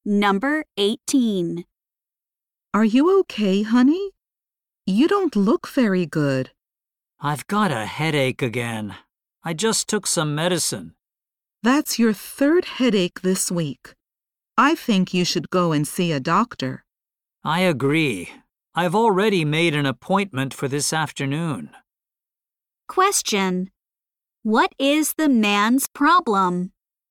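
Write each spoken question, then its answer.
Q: What is the man's problem?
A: He has a headache.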